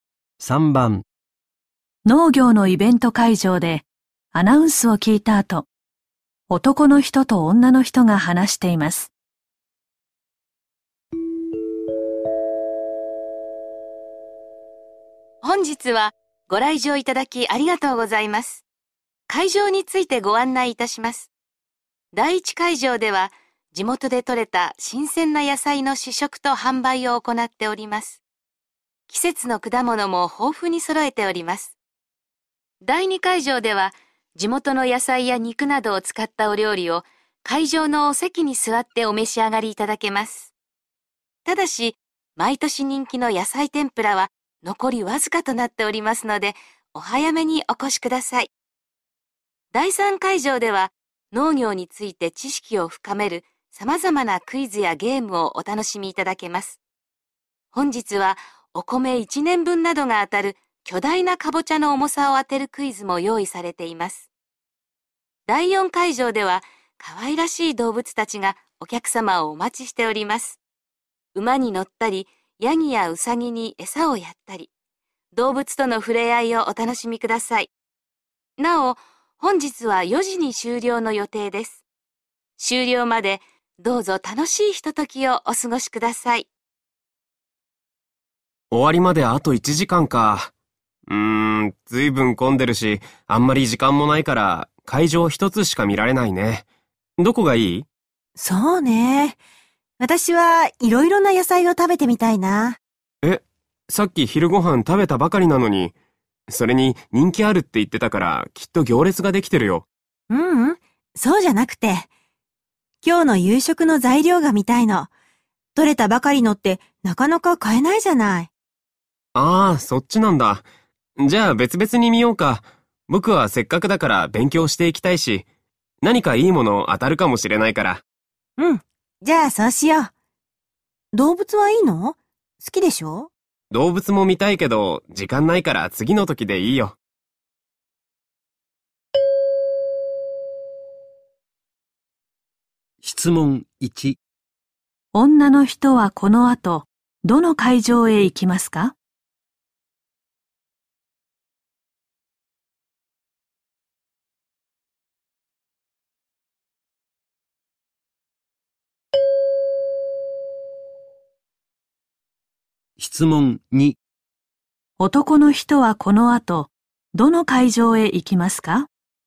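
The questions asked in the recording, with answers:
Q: 女の人はこの後どの会場へ行きますか?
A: 第一会場

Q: 男の人はこの後、どの会場へ行きますか?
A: 第三会場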